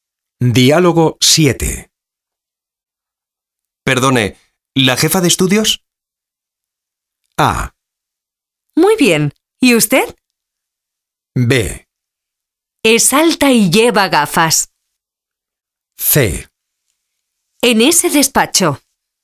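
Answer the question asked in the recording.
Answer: C: En ese despacho.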